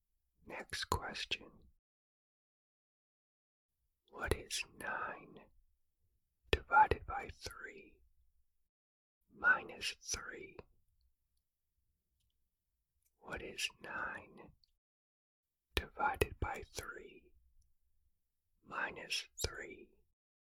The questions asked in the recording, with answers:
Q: What is 9 divided by 3 minus 3?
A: The answer is 0.